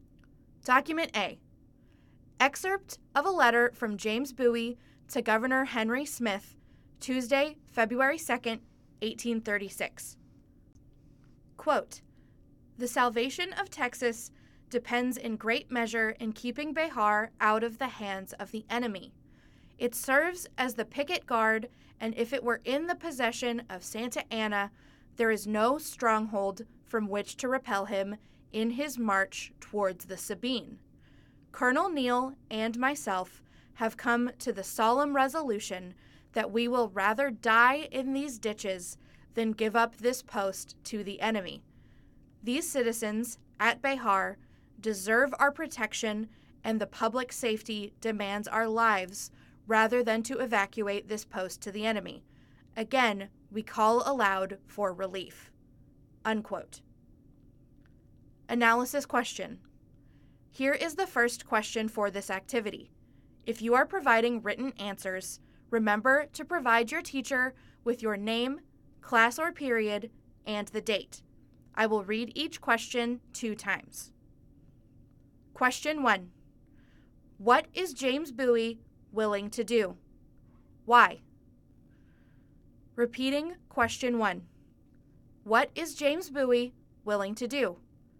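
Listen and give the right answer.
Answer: He would rather die in the ditches than give up Béjar to the enemy, because keeping Béjar is key to saving Texas and protecting its citizens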